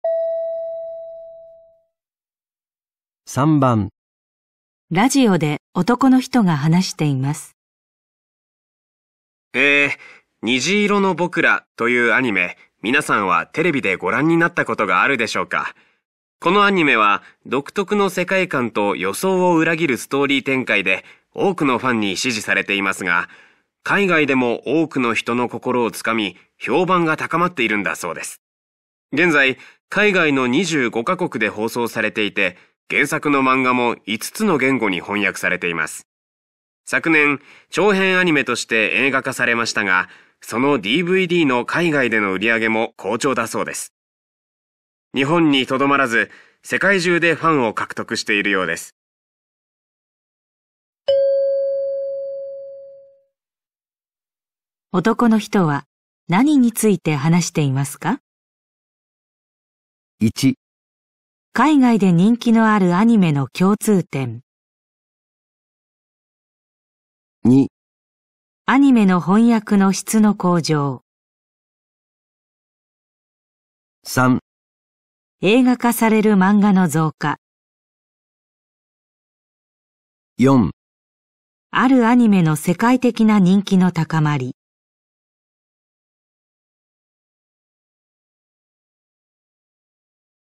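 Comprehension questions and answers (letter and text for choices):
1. 男の人は何について話していますか。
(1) 海外で人気のあるアニメの共通点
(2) アニメの翻訳の質の向上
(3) 映画化される漫画の増加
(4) あるアニメの世界的な人気の高まり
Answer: (4) あるアニメの世界的な人気の高まり

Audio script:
男:えー、《虹色の僕ら》というアニメ、皆さんはテレビでご覧になったことがあるでしょう か。このアニメは独特の世界観と予想を裏切るストーリー展開で多くのファンに支持されてい ますが、海外でも多くの人の心を掴み、評判が高まっているんだそうです。現在、海外の25カ 国で放送されていて、原作の漫画も5つの言語に翻訳されています。昨年、長編アニメとして 映画化されましたが、そのDVDの海外での売り上げも好調だそうです。日本に留まらず、世界 中でファンを獲得しているようです。

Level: 【N2 第2回】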